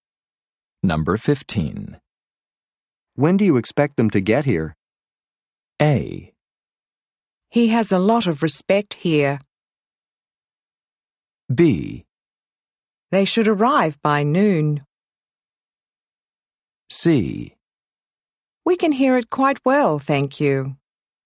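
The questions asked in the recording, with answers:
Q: When do you expect them to get here?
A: B: They should arrive by noon.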